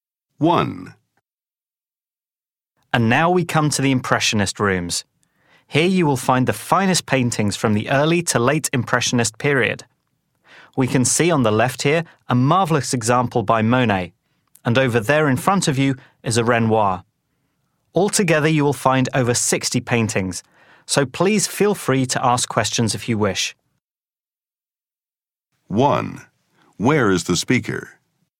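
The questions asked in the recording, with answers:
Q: Where is the speaker?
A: In an art gallery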